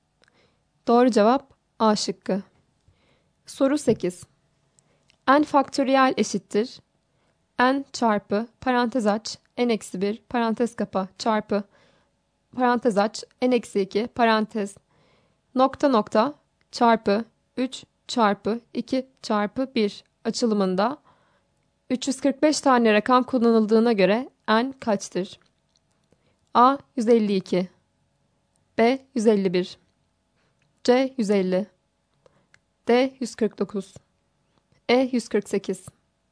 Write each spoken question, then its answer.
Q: N faktöriyel eşittir N çarpı parantez aç N eksi 1 parantez kapa çarpı parantez aç N eksi 2 parantez nokta nokta çarpı 3 çarpı 2 çarpı 1 açılımında 345 tane rakam kullanıldığına göre N kaçtır?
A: Doğru cevap B şıkkı.